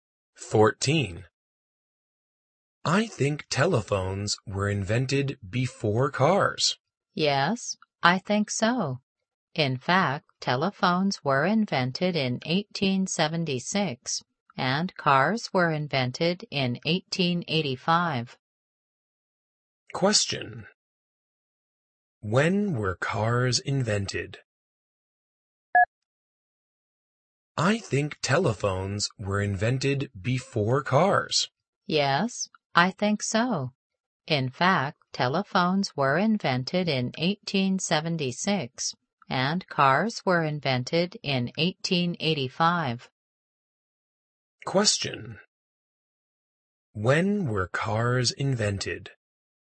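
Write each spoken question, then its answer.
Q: When were cars invented?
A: In 1885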